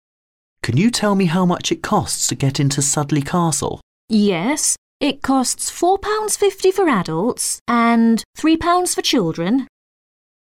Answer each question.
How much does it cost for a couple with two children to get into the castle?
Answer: £15.

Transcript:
M: Can you tell me how much it costs to get into Sudeley Castle?
W: Yes, it costs £4.50 for adults and £3 for children.